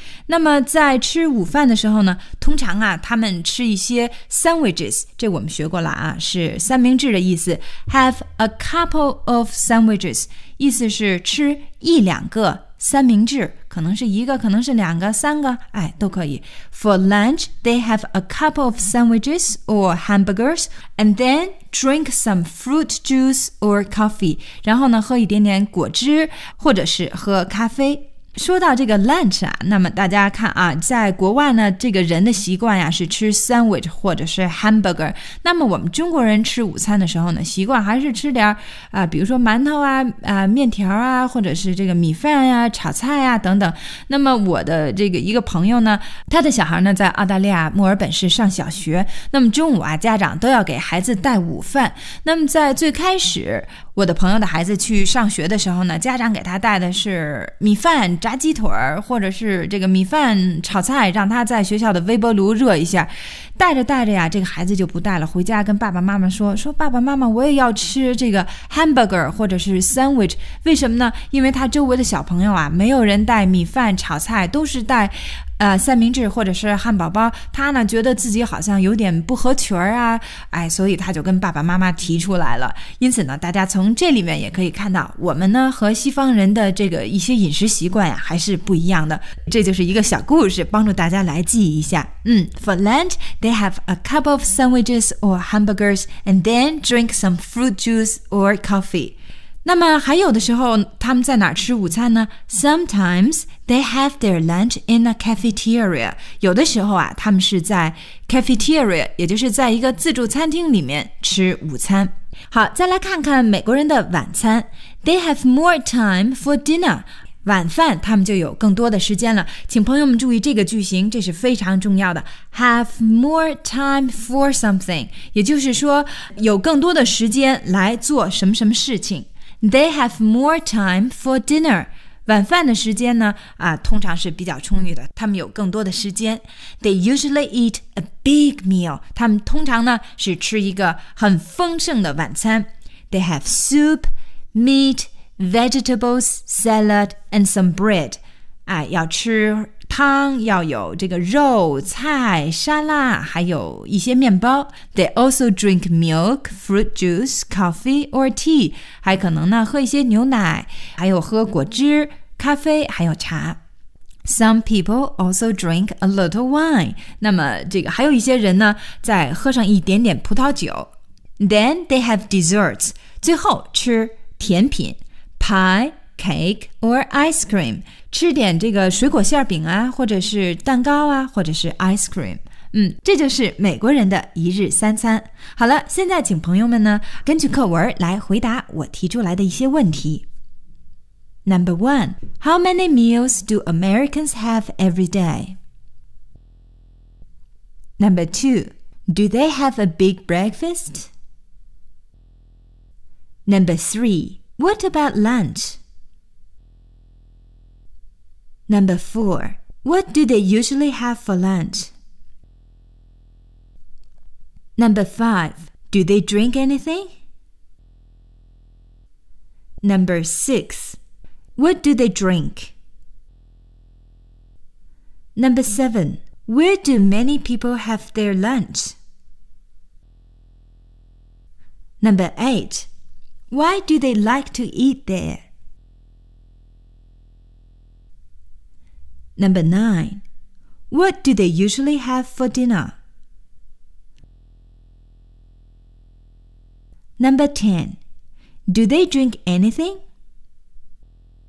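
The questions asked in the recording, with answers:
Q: What do they usually have for lunch?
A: A couple of sandwiches or hamburgers

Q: Do they drink anything?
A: Yes, they do.

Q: What do they drink?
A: Fruit juice or coffee

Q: Where do many people have their lunch?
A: In a cafeteria

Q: What do they usually have for dinner?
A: They have soup, meat, vegetables, salad, and some bread.

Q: Do they drink anything?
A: Yes, they do.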